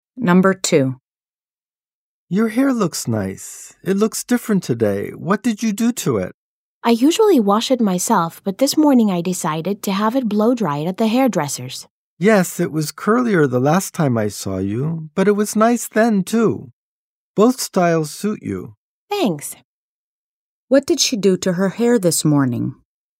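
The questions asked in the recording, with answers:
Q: What did she do to her hair this morning?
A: She had it blow-dried at the hairdresser's.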